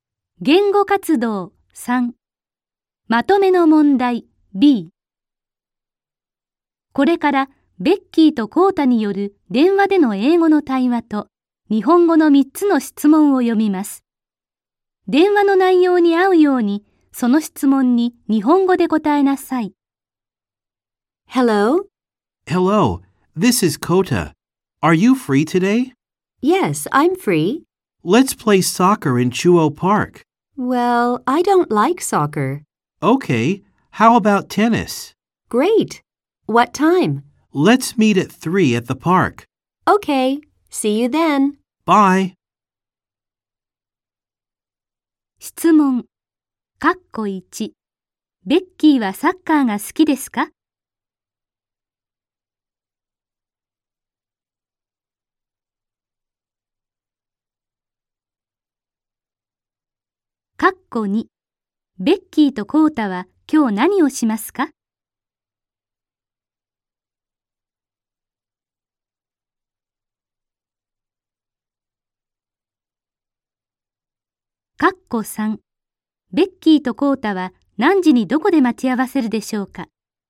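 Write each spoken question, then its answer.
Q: ベッキーはサッカーが好きですか?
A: いいえ、好きではありません。

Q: ベッキーとコータは今日何をしますか?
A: テニスをします。

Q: ベッキーとコータは何時にどこで待ち合わせるでしょうか?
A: 3時に中央公園で待ち合わせます。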